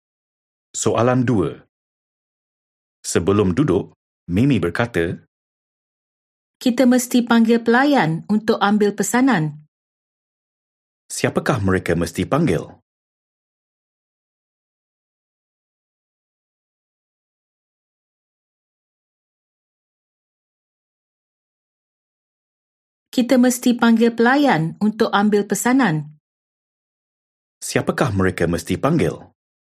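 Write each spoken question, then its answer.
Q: Siapakah mereka mesti panggil?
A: pelayan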